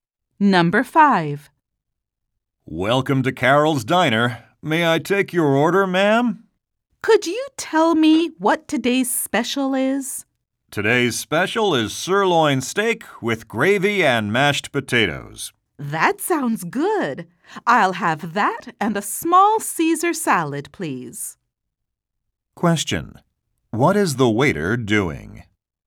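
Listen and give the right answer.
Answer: Taking an order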